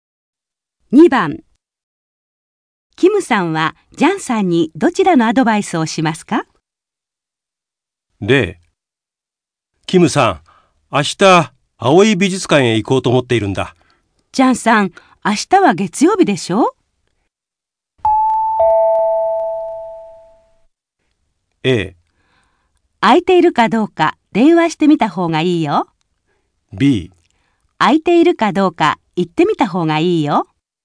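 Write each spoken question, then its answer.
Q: キムさんはジャンさんにどちらのアドバイスをしますか?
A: A: 空いているかどうか電話してみた方がいいよ。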